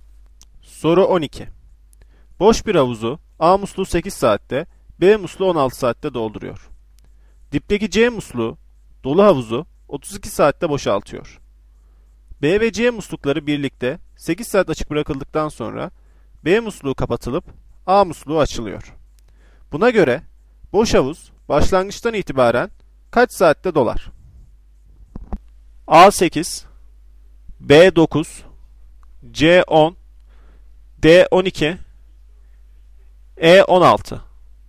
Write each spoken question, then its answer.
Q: Buna göre boş havuz başlangıçtan itibaren kaç saatte dolar?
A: Doğru cevap E 16.